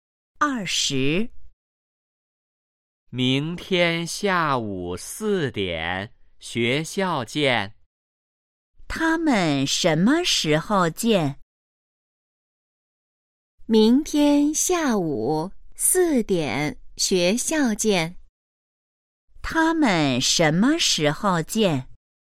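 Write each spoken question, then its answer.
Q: 他们什么时候见?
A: 明天下午四点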